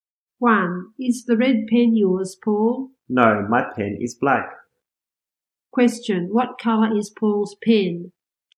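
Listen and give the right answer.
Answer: Black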